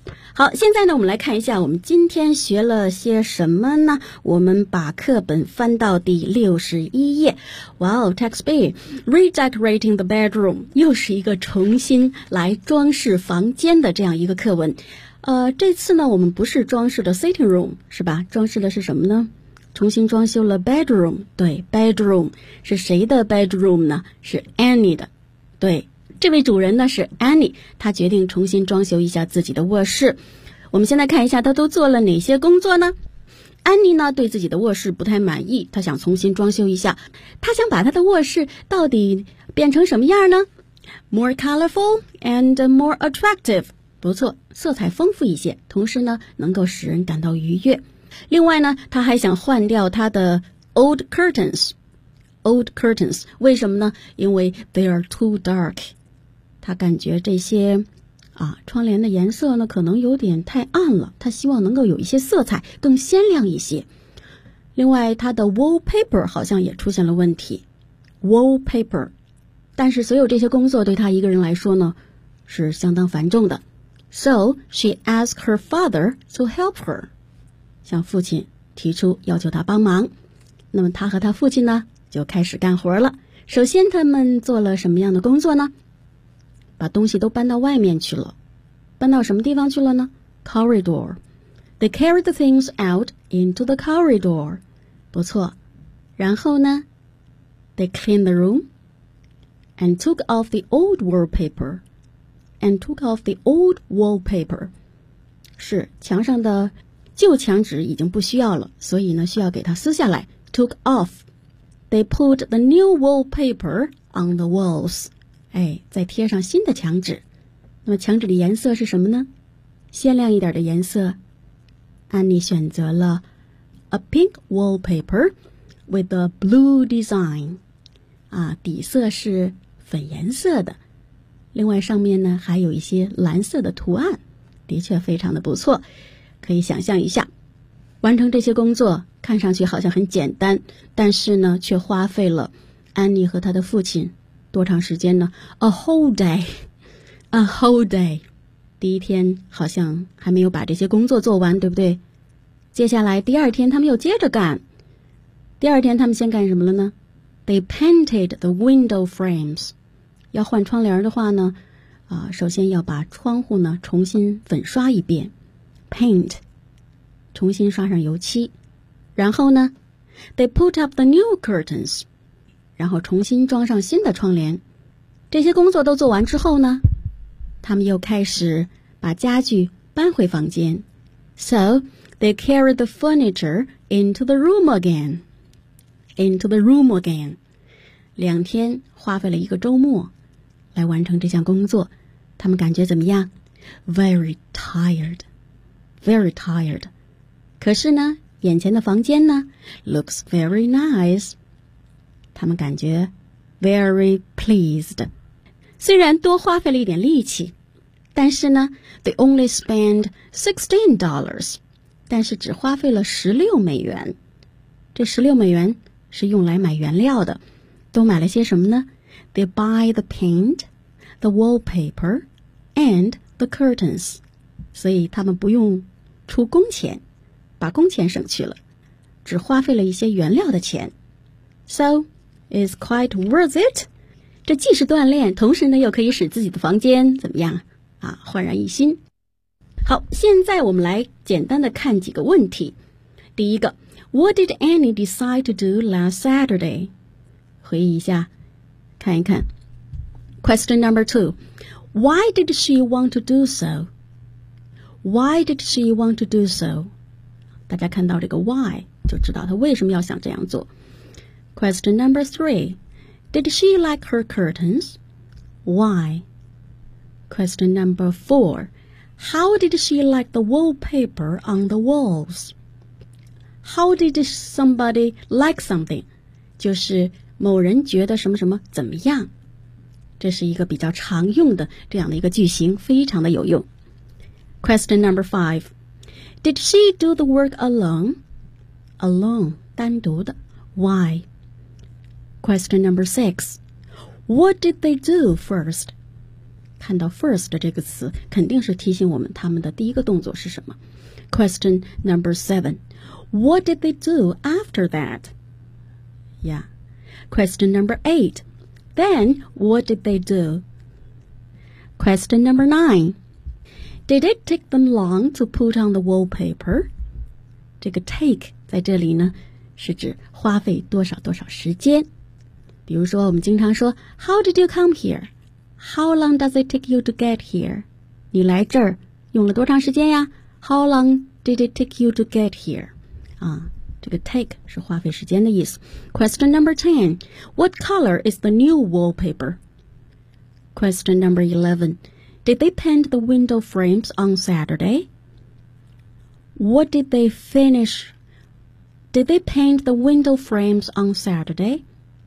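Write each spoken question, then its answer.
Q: What did Annie decide to do last Saturday?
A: To redecorate her bedroom

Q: Why did she want to do so?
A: She wanted to make it more colorful and attractive

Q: did she like her curtains? Why?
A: No, because they were too dark

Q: How did she like the wallpaper on the walls?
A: She didn't like it

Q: Did she do the work alone?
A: No, there was too much work, so she asked her father to help her

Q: What did they do first?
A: They carried the things out into the corridor

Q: What did they do after that?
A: They cleaned the room and took off the old wallpaper

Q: Did it take them long to put on the wallpaper?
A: Yes, a whole day

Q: What color is the new wallpaper?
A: Pink with a blue design

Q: Did they paint the window frames on Saturday?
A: No, they painted them the next day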